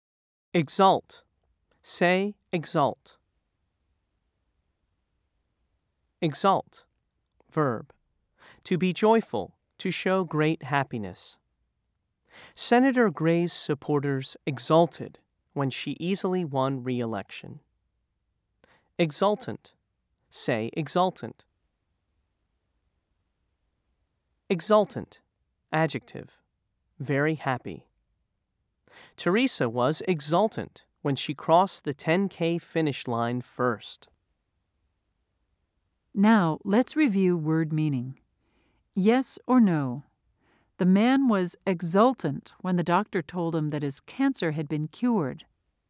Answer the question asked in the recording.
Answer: If you said yes, you are correct.